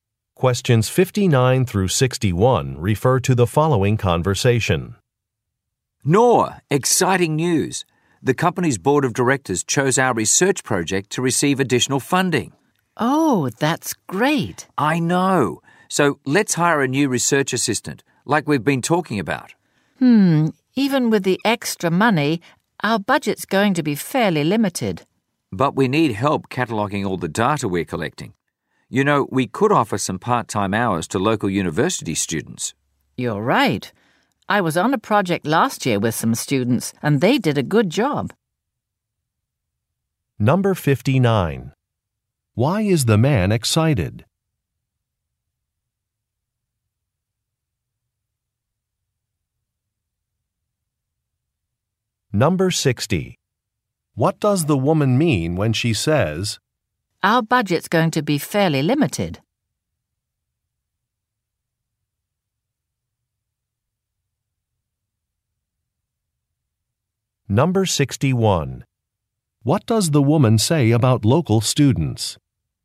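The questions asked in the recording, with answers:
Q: Why is the man excited?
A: The board chose their research project to receive additional funding.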